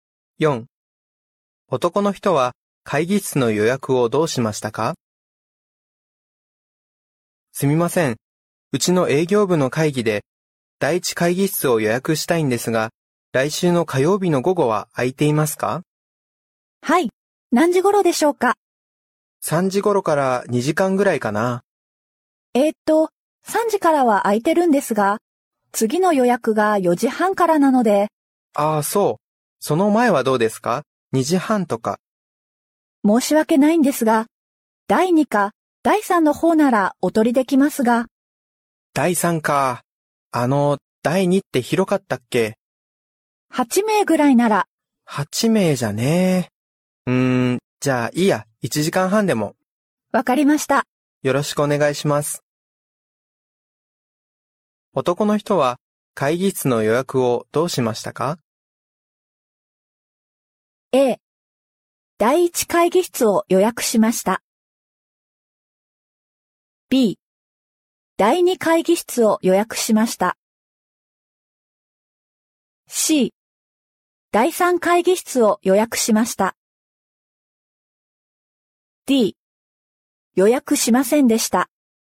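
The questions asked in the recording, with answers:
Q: 男の人は会議室の予約をどうしましたか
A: A 第一会議室を予約しました。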